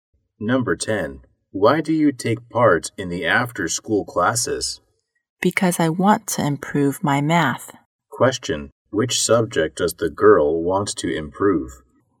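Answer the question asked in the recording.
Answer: Math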